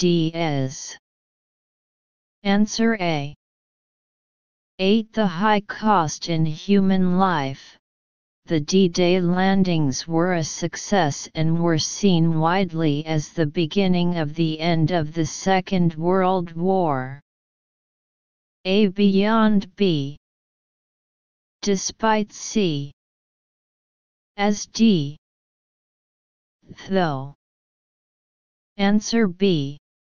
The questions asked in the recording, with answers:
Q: The high cost in human life, the D-Day landings were a success and were seen widely as the beginning of the end of the Second World War.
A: Answer B.